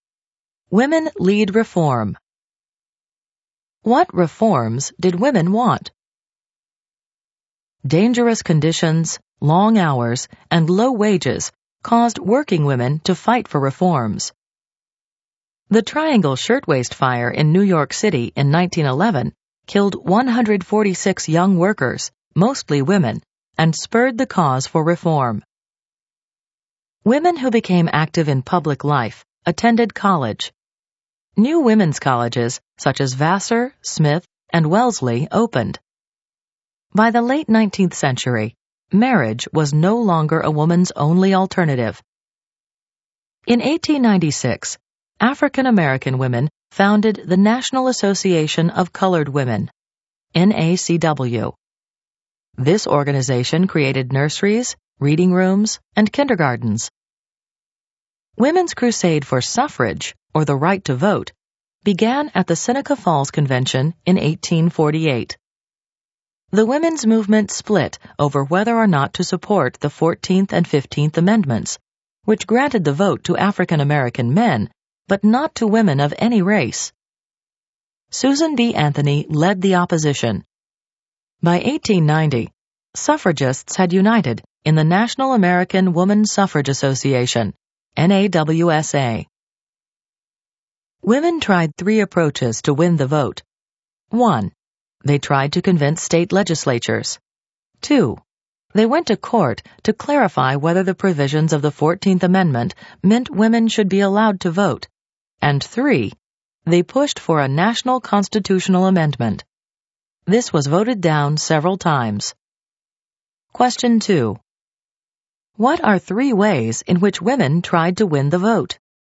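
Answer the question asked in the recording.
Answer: Convincing state legislatures, going to court over the 14th Amendment, pushing for a national constitutional amendment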